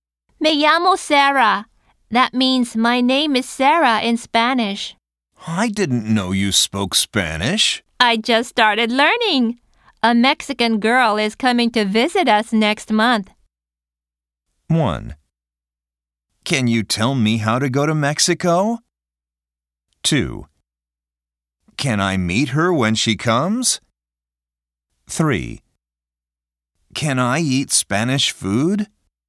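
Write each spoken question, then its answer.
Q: I just started learning. A Mexican girl is coming to visit us next month.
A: 2: Can I meet her when she comes?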